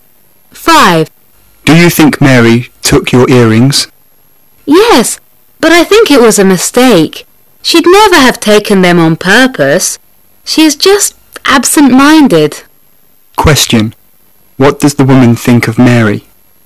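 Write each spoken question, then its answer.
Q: What does the woman think of Mary?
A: She is absent-minded, not dishonest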